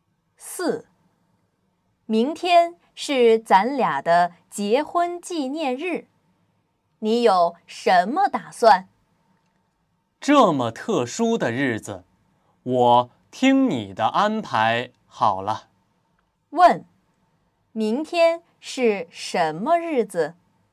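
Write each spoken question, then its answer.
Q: 问,明天是什么日子?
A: 结婚纪念日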